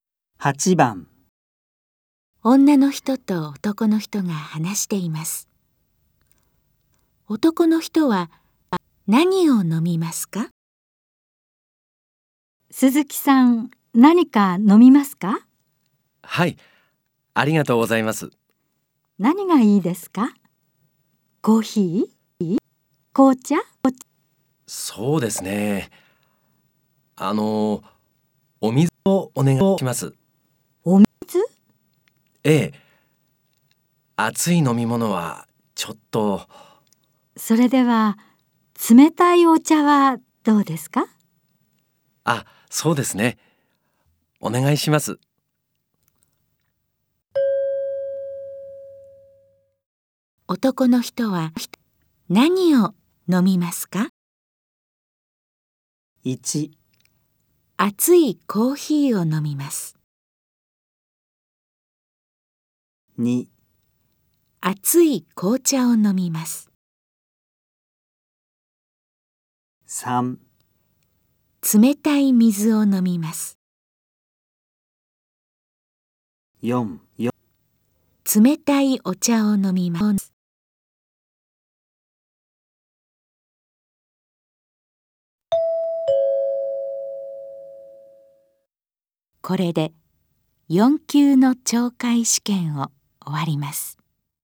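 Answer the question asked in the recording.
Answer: 4: 冷たいお茶を飲みます。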